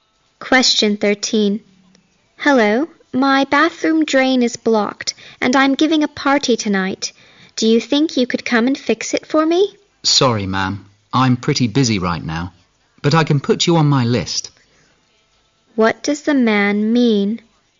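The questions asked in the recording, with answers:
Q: What does the man mean?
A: He is too busy to come right now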